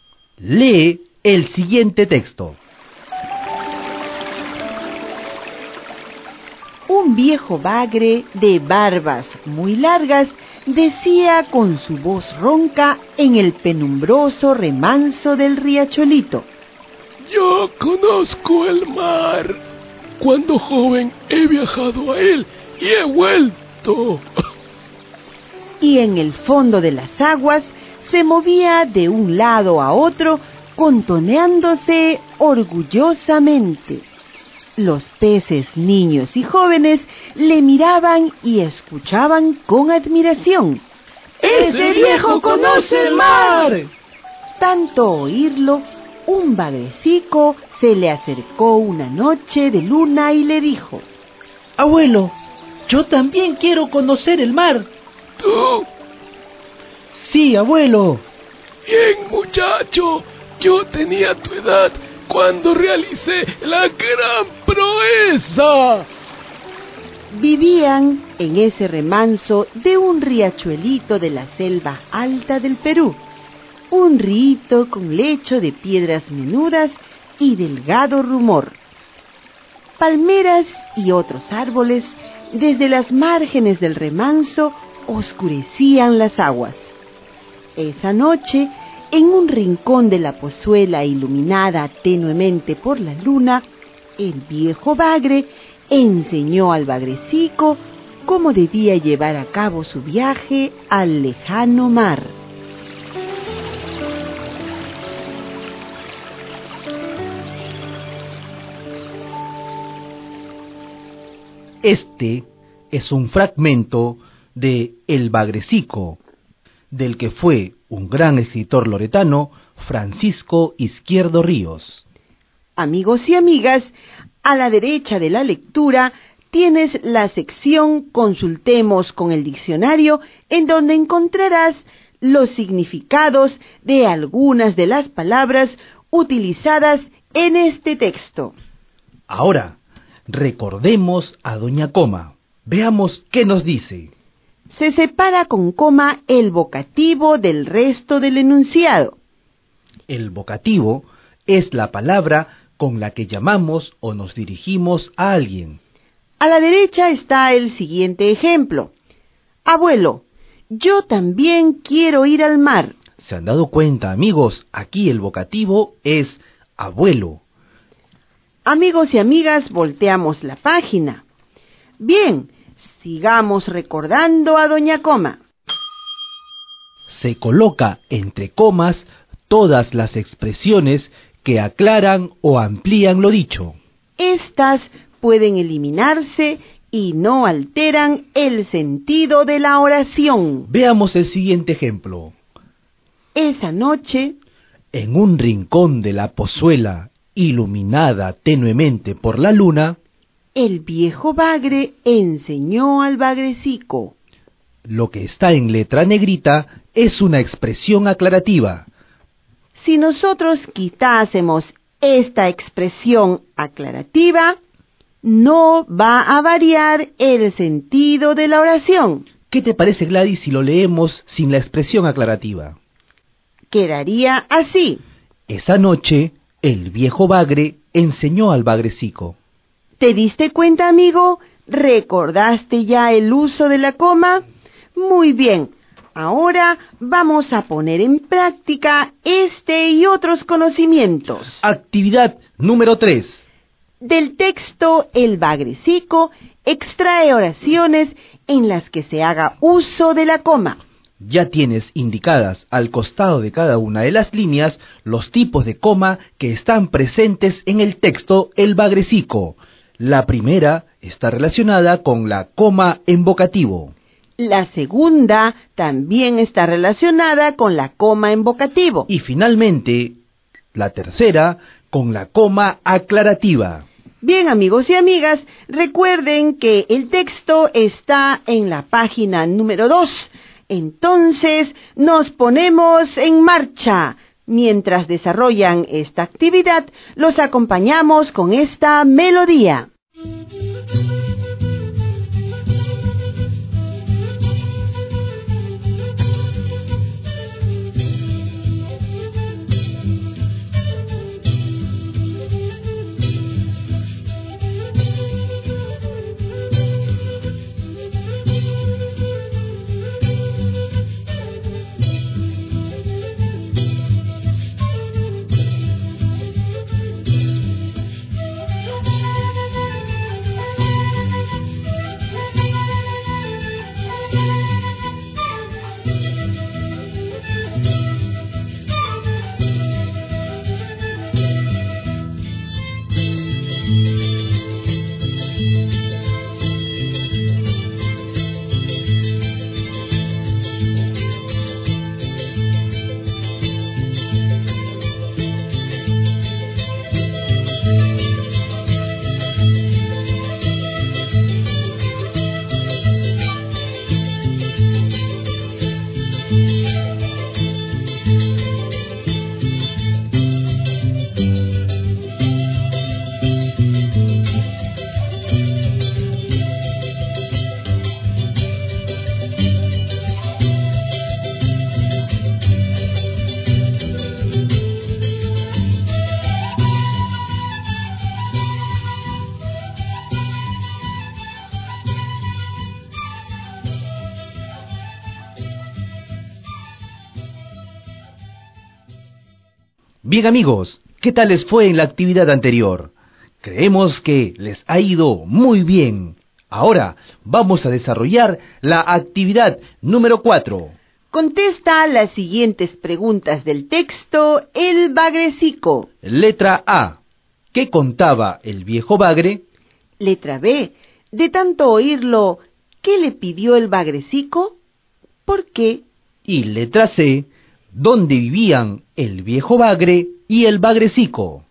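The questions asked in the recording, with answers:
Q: ¿Qué contaba el viejo bagre?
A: Que conocía el mar: de joven había viajado a él y había vuelto.

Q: De tanto oírlo, ¿qué le pidió el bagrecico? ¿Por qué?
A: Le pidió conocer el mar también, porque de tanto oír al abuelo quiso hacer el mismo viaje.

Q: ¿Dónde vivían el viejo bagre y el bagrecico?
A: En un remanso de un riachuelito de la selva alta del Perú.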